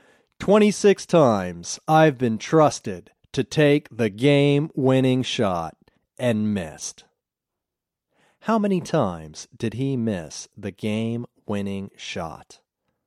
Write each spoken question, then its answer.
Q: How many times did he miss the game-winning shot?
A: He missed the game-winning shot 26 times.